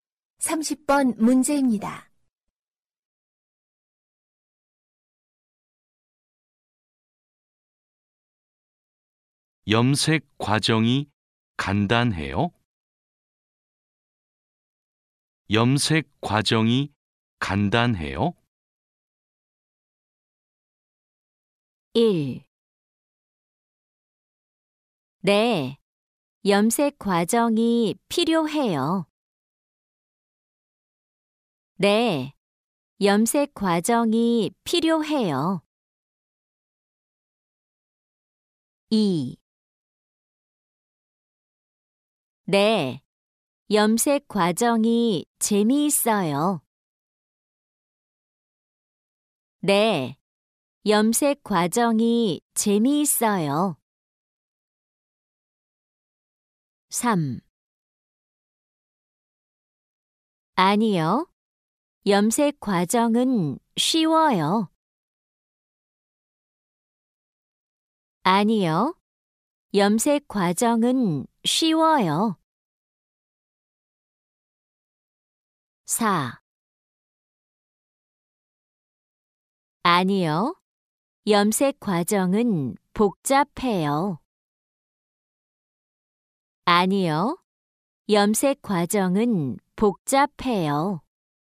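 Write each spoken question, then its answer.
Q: 염색 과정이 간단해요?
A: 4: 아니요. 염색 과정은 복잡해요.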